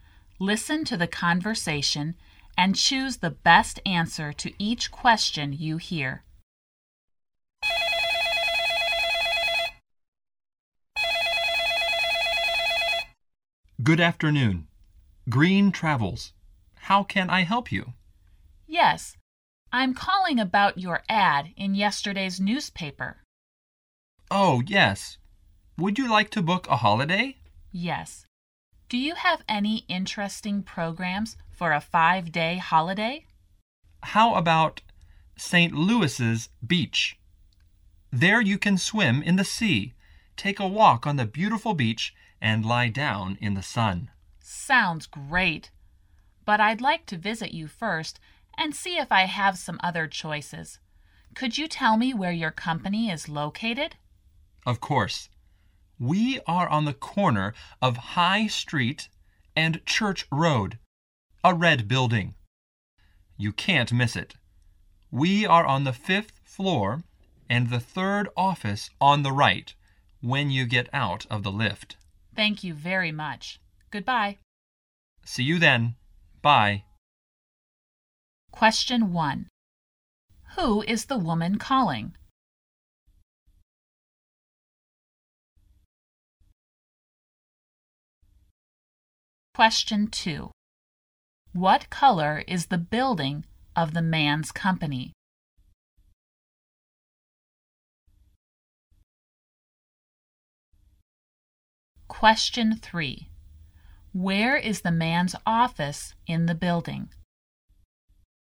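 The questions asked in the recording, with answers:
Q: Who is the woman calling?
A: A travel agency (Green Travels)

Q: What color is the building of the man's company?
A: Red

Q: Where is the man's office in the building?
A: On the 5th floor, the 3rd office on the right from the lift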